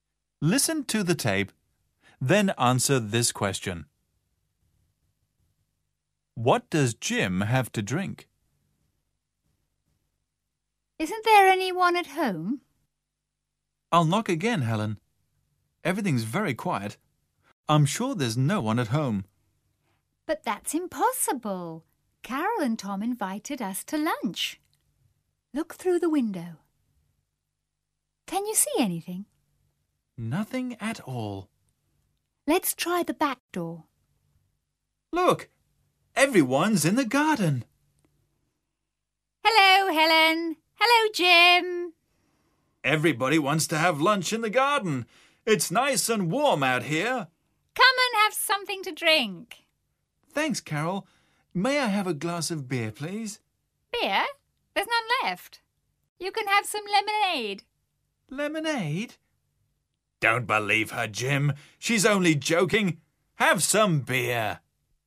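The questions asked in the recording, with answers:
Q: What does Jim have to drink?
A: Beer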